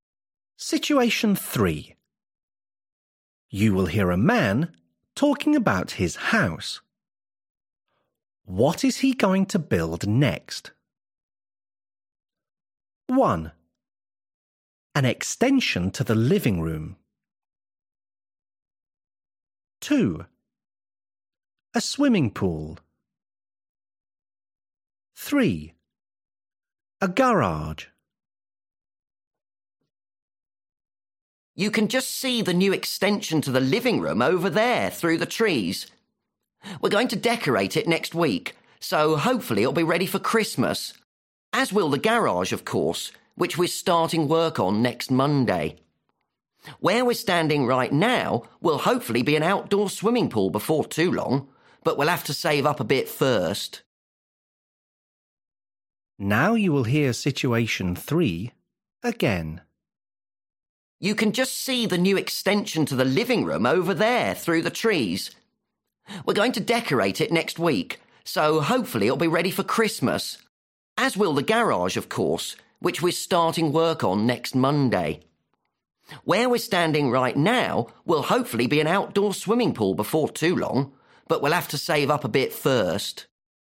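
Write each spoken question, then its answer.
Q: What is he going to build next?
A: 3: A garage.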